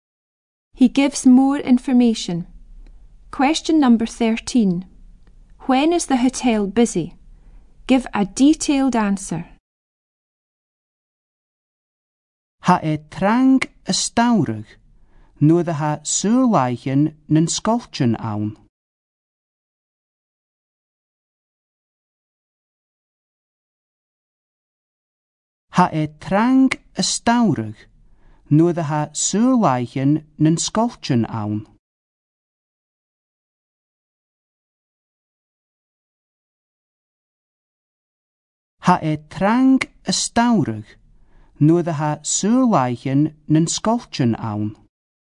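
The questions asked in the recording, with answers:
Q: When is the hotel busy?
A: In summer, when the schools are on holiday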